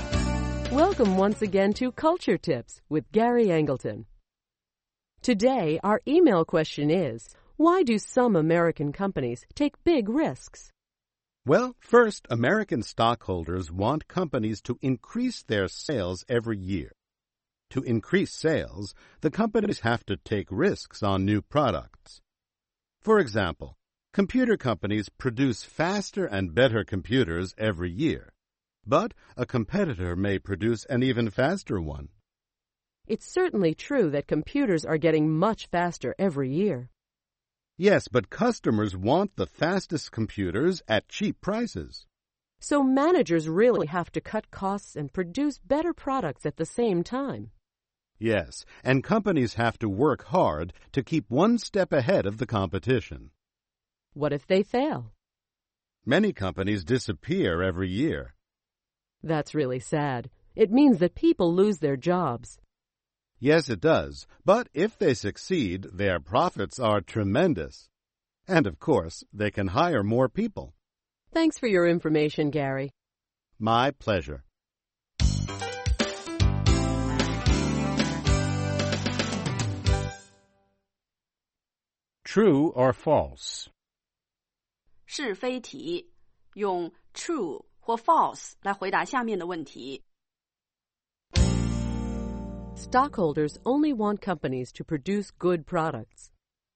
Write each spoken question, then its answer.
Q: Stockholders only want companies to produce good products.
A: False. They also want the company to increase sales and make big profits.